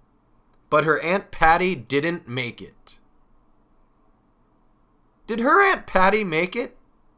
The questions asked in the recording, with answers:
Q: Did her Aunt Patty make it?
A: Nope. No, she did not. Her Aunt Patty did not make it.